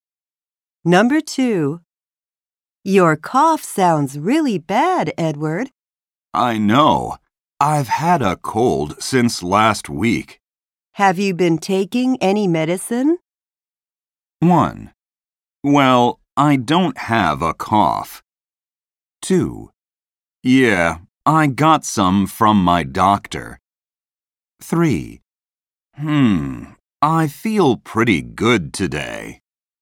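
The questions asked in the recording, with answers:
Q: Have you been taking any medicine?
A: 2: Yeah, I got some from my doctor.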